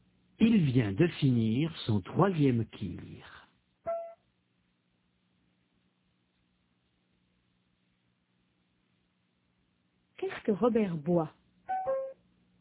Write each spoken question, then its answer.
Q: Qu'est-ce que Robert boit ?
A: Un tir.